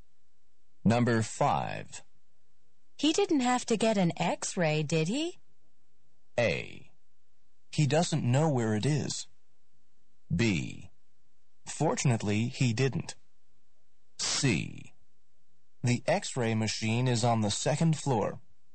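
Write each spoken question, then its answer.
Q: He didn't have to get an X-ray, did he?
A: B: Fortunately, he didn't.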